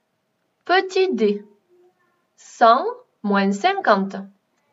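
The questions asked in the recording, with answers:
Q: Petit D, 100 moins 50.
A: 50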